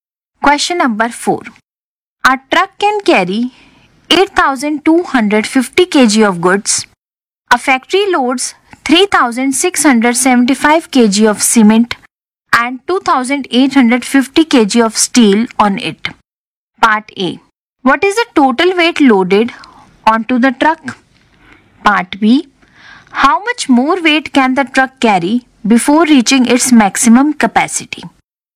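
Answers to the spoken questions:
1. 6,525 kg
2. 1,725 kg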